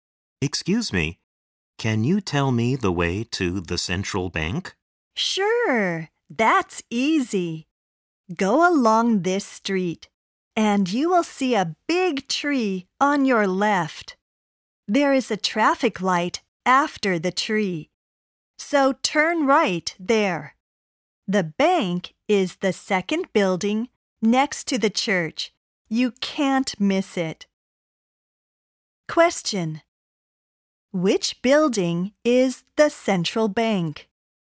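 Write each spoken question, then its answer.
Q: Which building is the central bank?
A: The second building next to the church, after turning right at the traffic light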